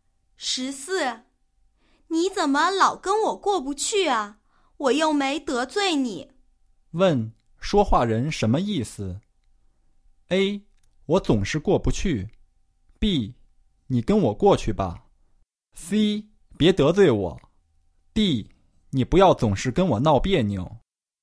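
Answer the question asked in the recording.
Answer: D: 你不要总是跟我闹别扭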